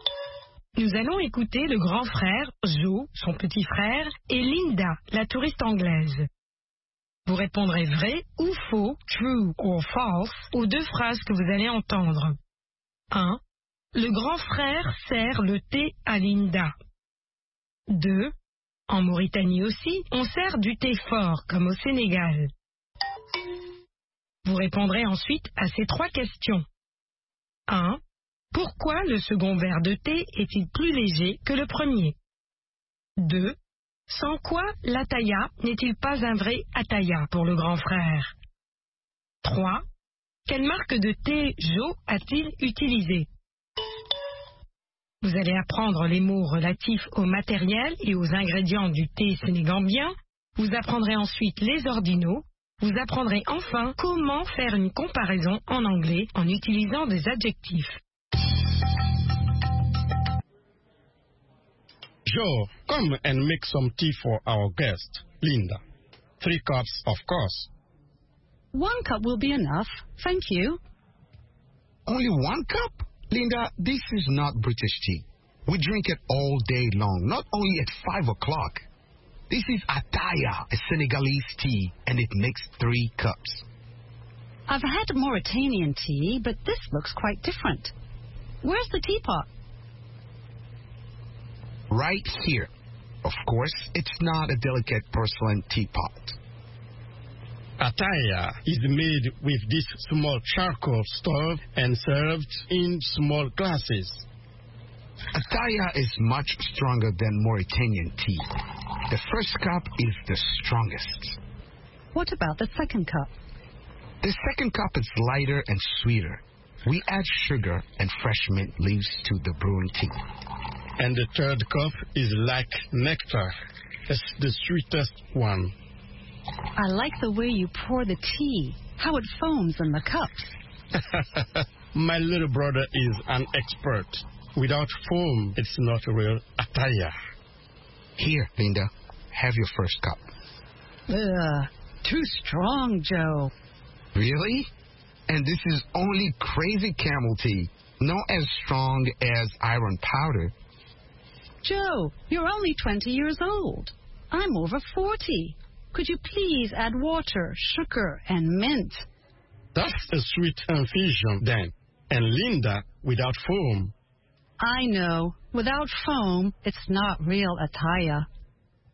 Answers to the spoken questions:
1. L'énoncé 1 est faux.
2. L'énoncé 2 est faux.
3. Il est plus sucré et parfumé aux feuilles de menthe fraîches.
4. Sans la mousse.
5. Crazy Camel.